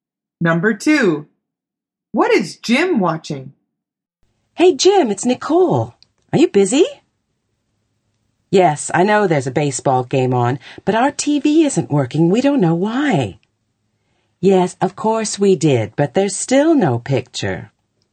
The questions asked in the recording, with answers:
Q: What is Jim watching?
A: The answer is a baseball game.